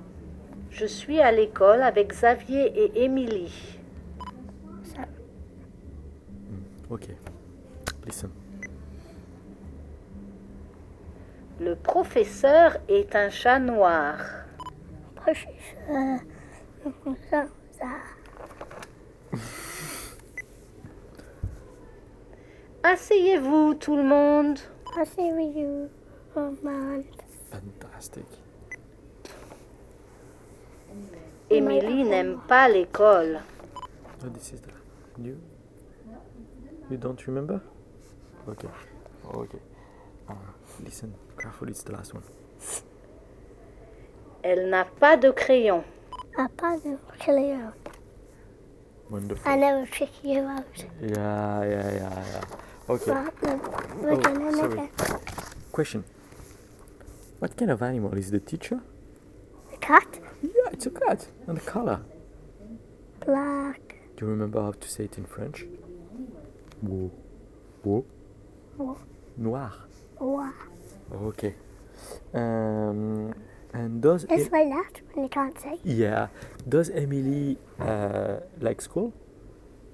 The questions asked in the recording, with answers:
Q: What kind of animal is the teacher?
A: Yeah, it's a cat.

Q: And the color?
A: Black.

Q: Does Emily like school?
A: No, she doesn't like.